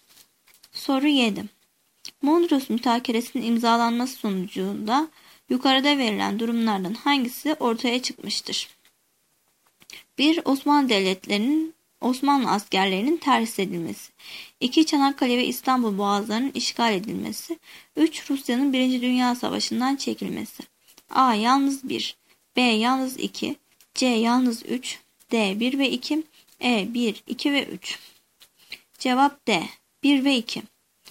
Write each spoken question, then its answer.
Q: Mondros Mütakeresi'nin imzalanması sonucunda yukarıda verilen durumlardan hangisi ortaya çıkmıştır?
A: Cevap D. 1 ve 2.